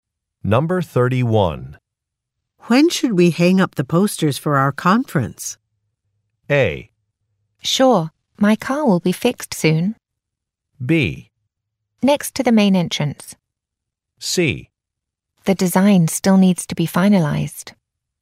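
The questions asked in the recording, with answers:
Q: When should we hang up the posters for our conference?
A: C: The design still needs to be finalized.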